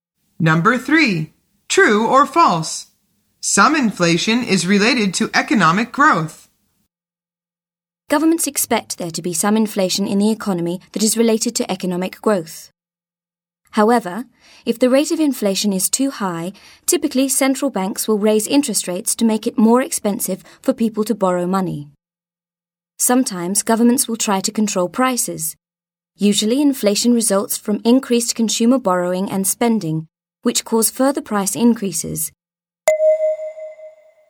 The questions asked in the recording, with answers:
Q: True or false? Some inflation is related to economic growth.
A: The answer is true.